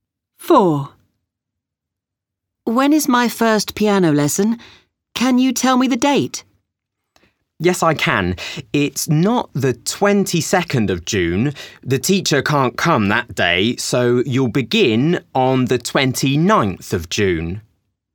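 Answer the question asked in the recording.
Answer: The 29th of June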